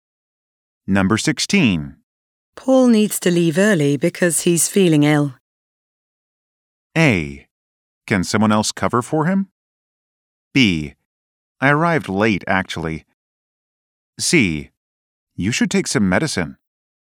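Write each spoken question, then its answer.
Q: Paul needs to leave early because he's feeling ill.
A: A: Can someone else cover for him?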